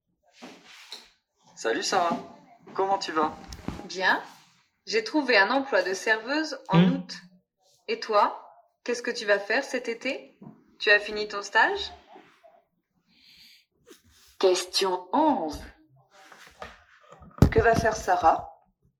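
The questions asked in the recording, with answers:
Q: Que va faire Sarah?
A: Travailler comme serveuse en août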